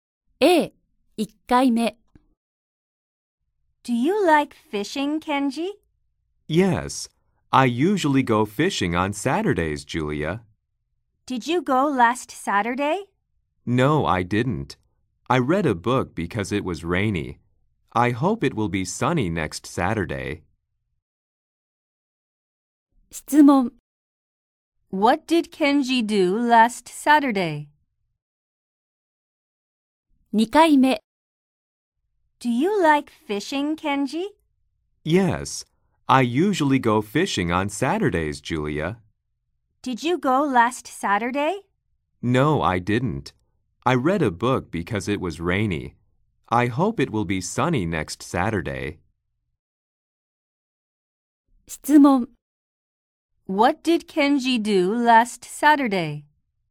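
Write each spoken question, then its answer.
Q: What did Kenji do last Saturday?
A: He read a book.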